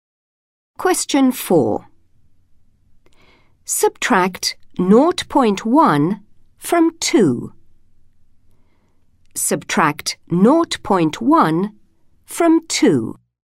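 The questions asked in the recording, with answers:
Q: Subtract 0.1 from 2.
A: 1.9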